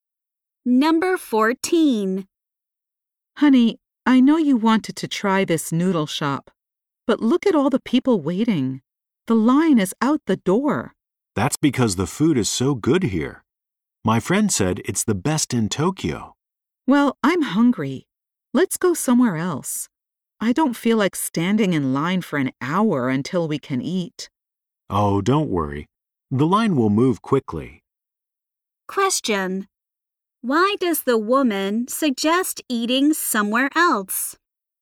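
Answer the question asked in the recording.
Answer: She doesn't want to wait in the long line.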